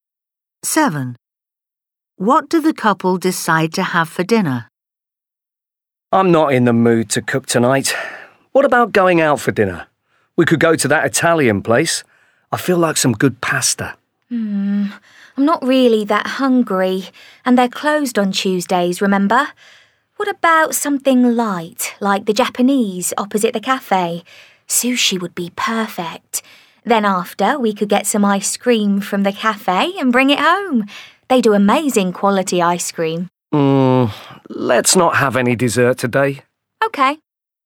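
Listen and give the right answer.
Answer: sushi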